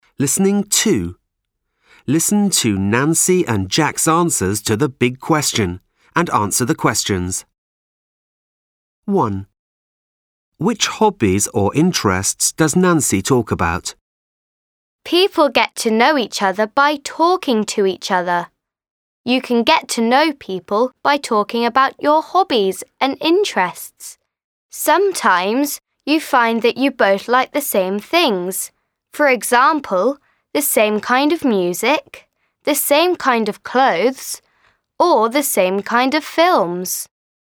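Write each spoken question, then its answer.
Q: Which hobbies or interests does Nancy talk about?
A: music, clothes and films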